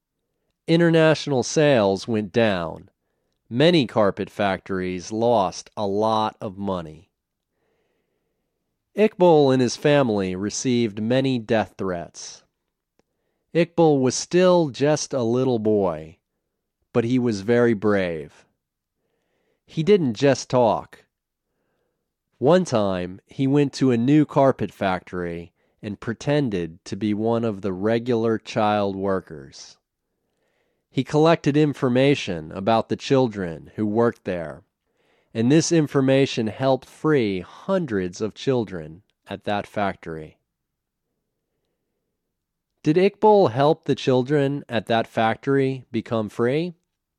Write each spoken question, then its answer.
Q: Did Iqbal help the children at that factory become free?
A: Yes, Iqbal helped hundreds of children at that factory become free.